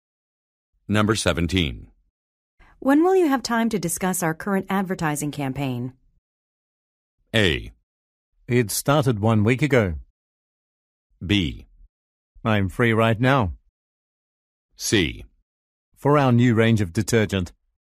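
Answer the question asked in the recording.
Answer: B: I'm free right now.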